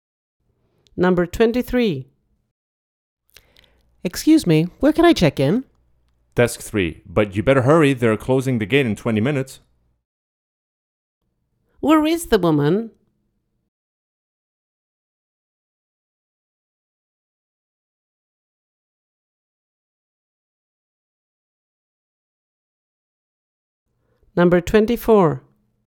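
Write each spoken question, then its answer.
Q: Where is the woman?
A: at the airport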